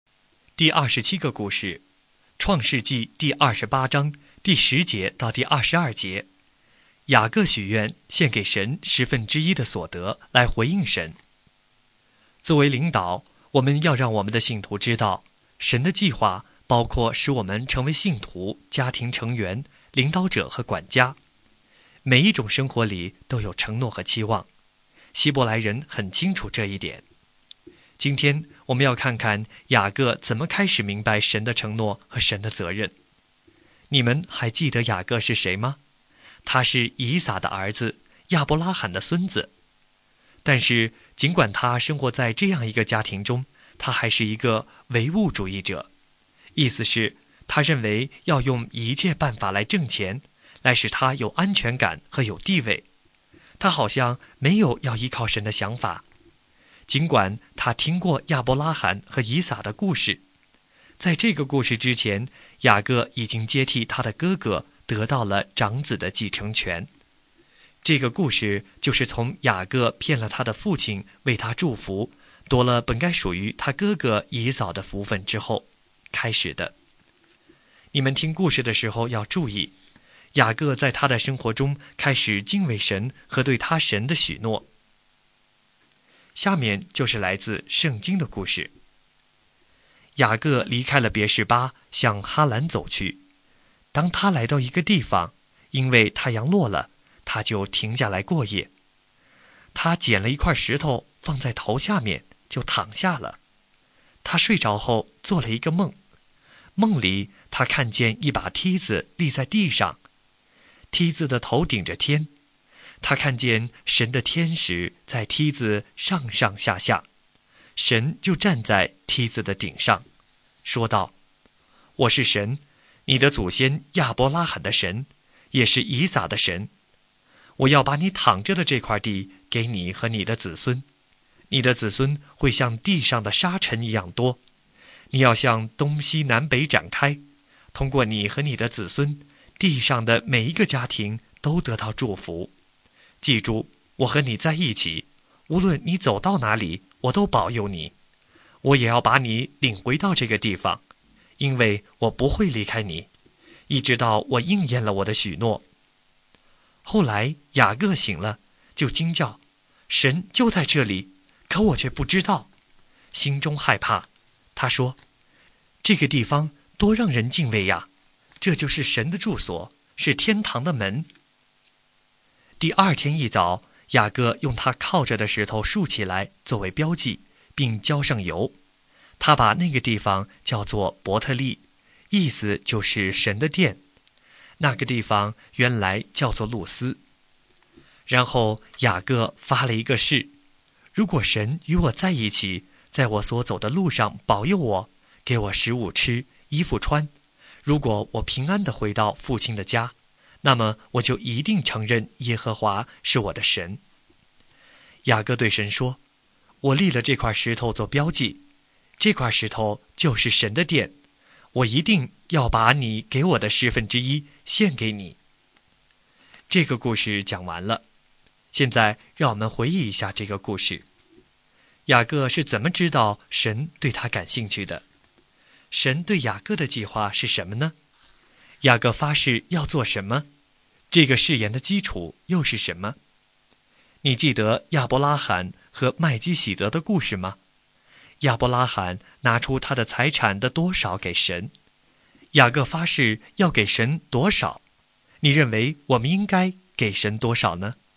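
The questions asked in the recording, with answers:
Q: 雅各是怎么知道神对他感兴趣的?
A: 神在梦中向他显现,对他说话

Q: 神对雅各的计划是什么呢?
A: 把他躺着的地赐给他和他的子孙,使子孙众多,使地上的每一个家庭都通过他得福

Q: 雅各发誓要做什么?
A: 承认耶和华是他的神,把神给他的十分之一献给神

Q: 这个誓言的基础又是什么?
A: 如果神与他同在,保佑他,给他吃穿,使他平安回到父亲的家

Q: 雅各发誓要给神多少?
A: 十分之一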